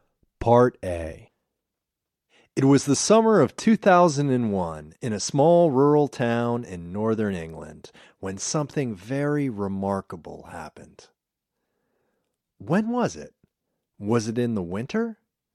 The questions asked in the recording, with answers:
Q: When was it? Was it in the winter?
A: No, it wasn't the winter.